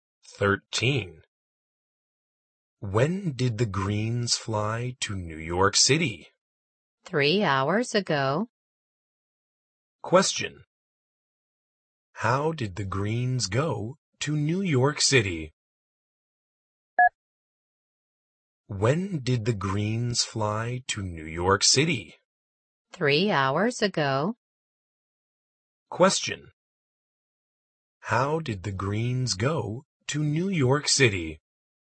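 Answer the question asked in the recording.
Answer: By plane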